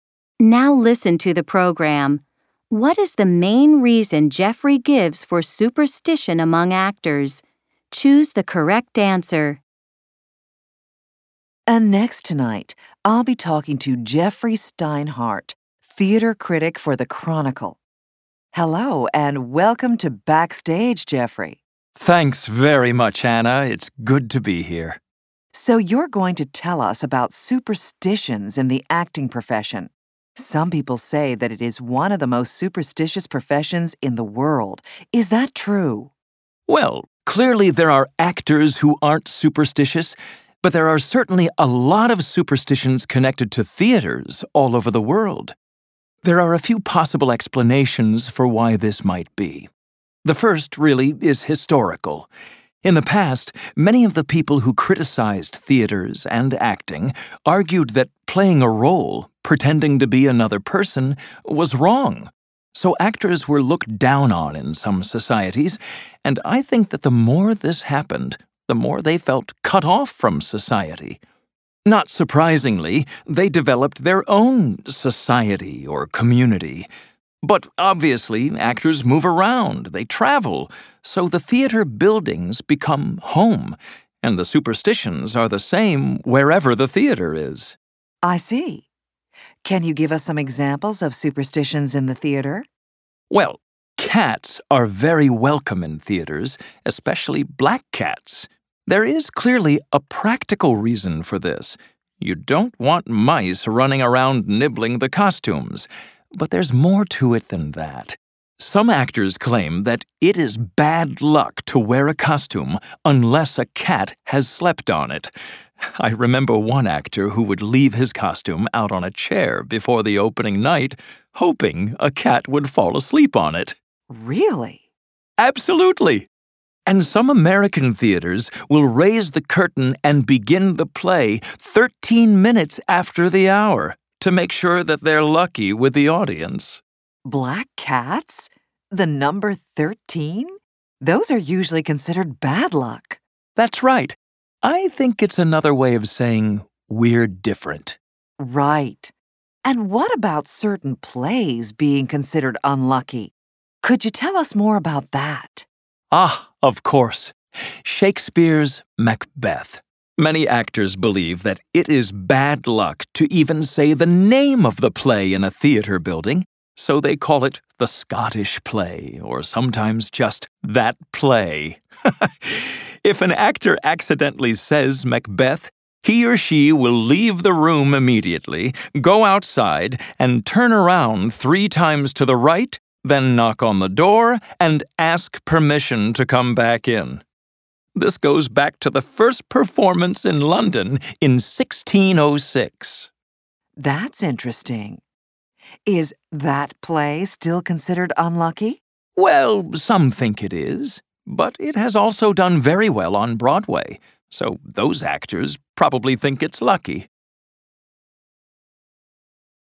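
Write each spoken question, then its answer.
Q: What is the main reason Jeffrey gives for superstition among actors?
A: Historical: actors were looked down on and felt cut off from society, so they formed their own community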